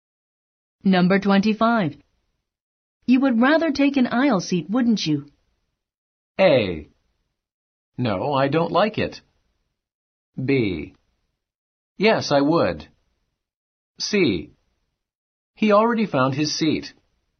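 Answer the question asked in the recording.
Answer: B: Yes, I would.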